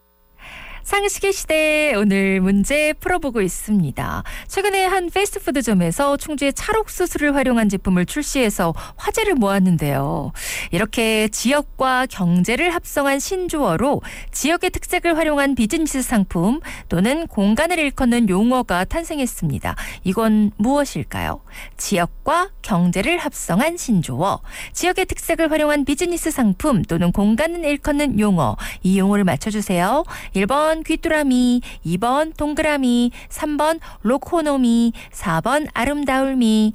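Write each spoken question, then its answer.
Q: 이건 무엇일까요? 지역과 경제를 합성한 신조어, 지역의 특색을 활용한 비즈니스 상품 또는 공간을 일컫는 용어, 이 용어를 맞춰주세요.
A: 3번: 로코노미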